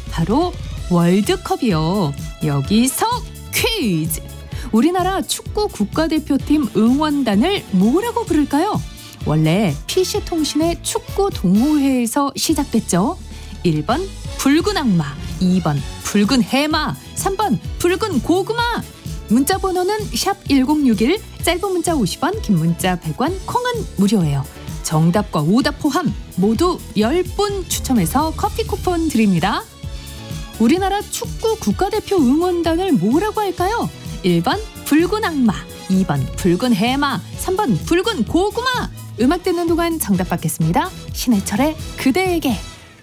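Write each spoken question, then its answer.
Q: 우리나라 축구 국가대표 응원단을 뭐라고 할까요?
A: 1: 붉은 악마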